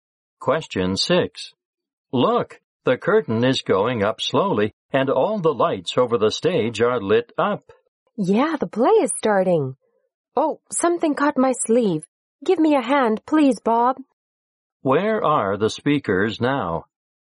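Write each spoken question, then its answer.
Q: Where are the speakers now?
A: In a theater.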